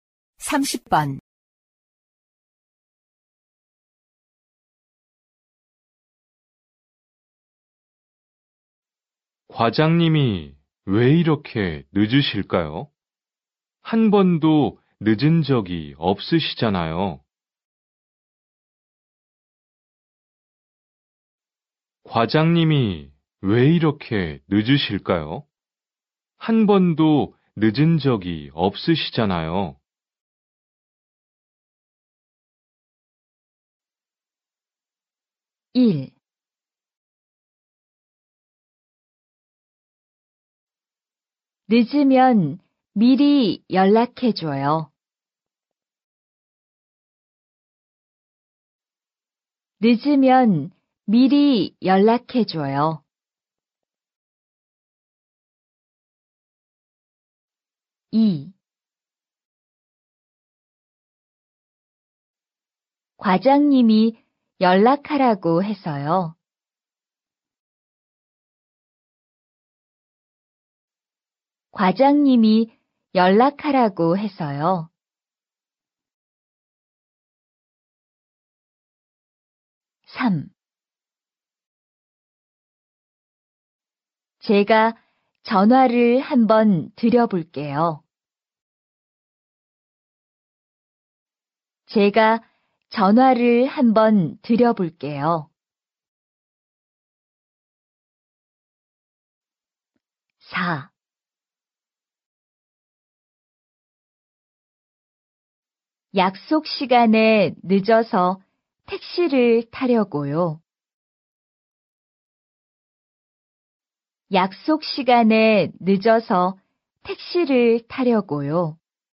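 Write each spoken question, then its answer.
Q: 과장님이 왜 이렇게 늦으실까요? 한 번도 늦은 적이 없으시잖아요.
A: 3: 제가 전화를 한번 드려볼게요.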